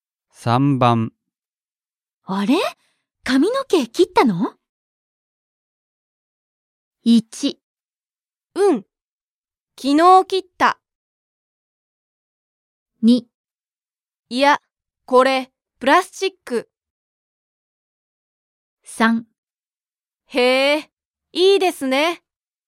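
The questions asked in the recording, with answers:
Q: あれ?髪の毛切ったの?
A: 1: うん、昨日切った。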